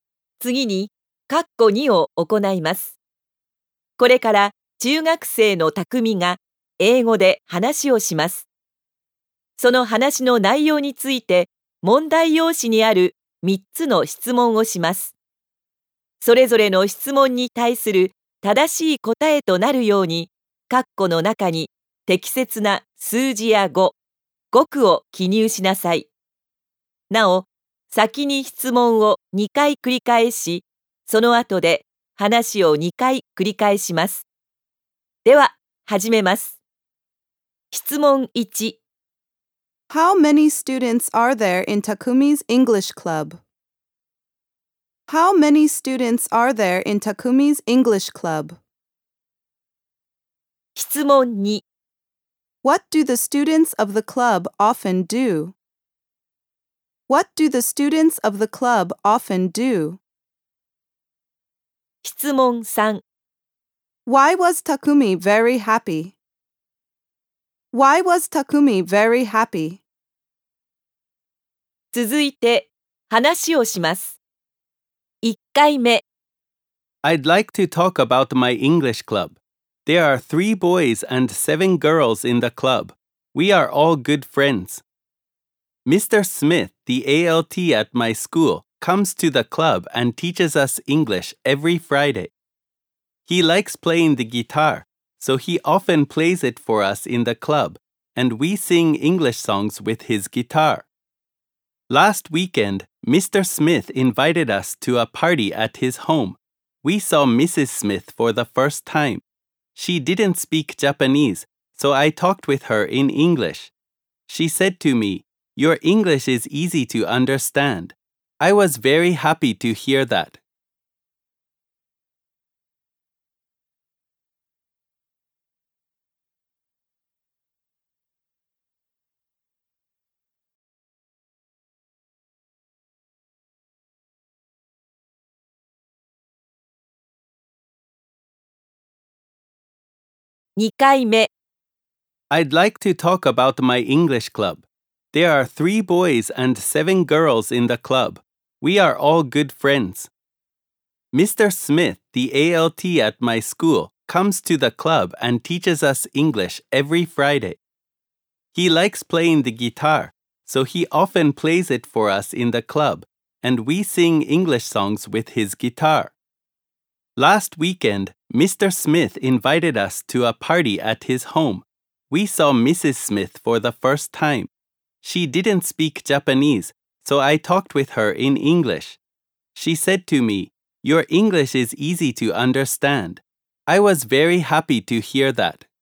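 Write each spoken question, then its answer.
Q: How many students are there in Takumi's English Club?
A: Ten.

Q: What do the students of the club often do?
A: They sing English songs while Mr. Smith plays the guitar.

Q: Why was Takumi very happy?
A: Because Mrs. Smith said his English was easy to understand.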